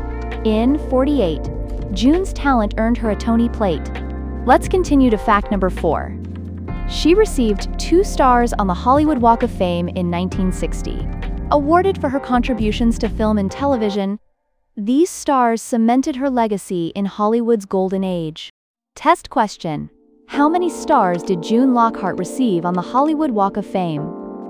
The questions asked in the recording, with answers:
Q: How many stars did June Lockhart receive on the Hollywood Walk of Fame?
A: Correct answer, 2.